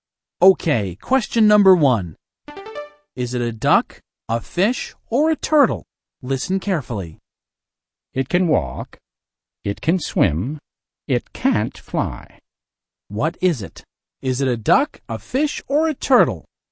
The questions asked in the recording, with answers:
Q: What is it? Is it a duck, a fish, or a turtle?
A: It's a turtle. A turtle can walk and swim, but it can't fly.